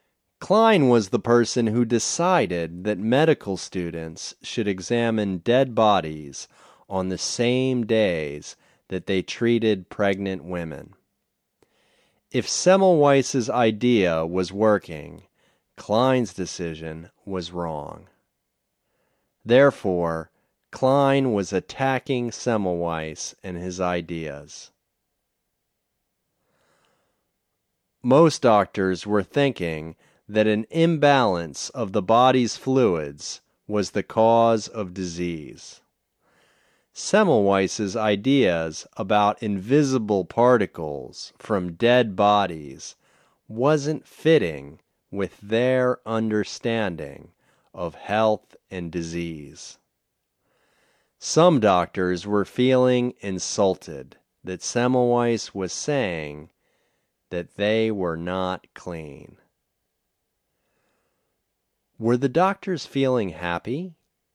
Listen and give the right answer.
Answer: No, they weren't feeling happy.